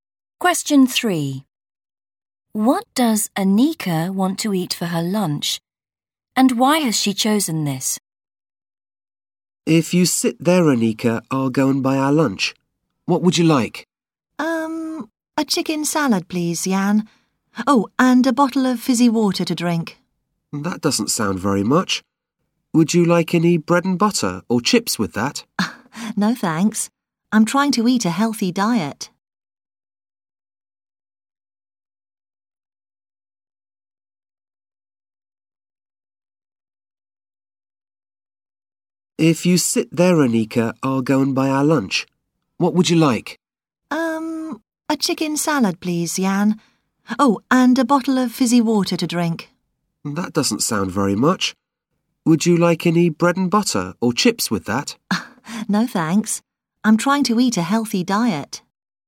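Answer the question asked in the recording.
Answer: a chicken salad, because she is trying to eat a healthy diet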